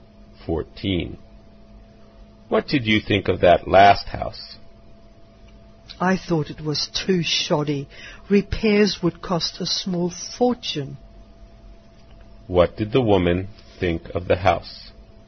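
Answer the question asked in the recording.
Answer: It was badly built and repairs would be very costly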